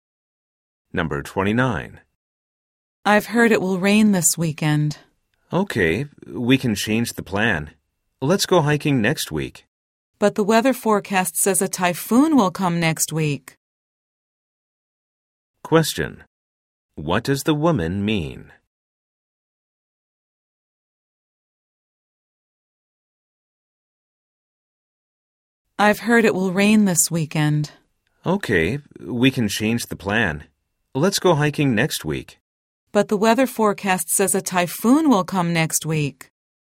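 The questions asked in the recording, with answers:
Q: What does the woman mean?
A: They may not be able to go hiking next week either, because a typhoon is coming.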